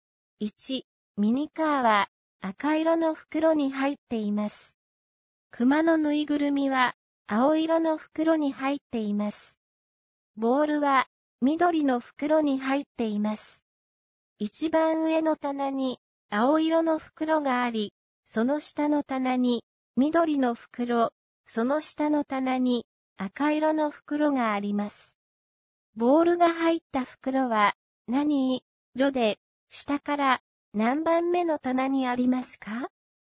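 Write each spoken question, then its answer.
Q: ボールが入った袋は何色で、下から何番目の棚にありますか?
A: 緑色、下から2番目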